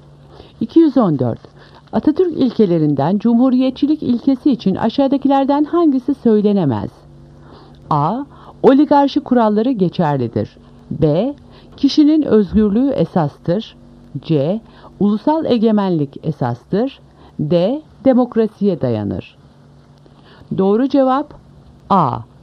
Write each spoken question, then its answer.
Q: Atatürk ilkelerinden cumhuriyetçilik ilkesi için aşağıdakilerden hangisi söylenemez?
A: Doğru cevap A. Oligarşi kuralları geçerlidir.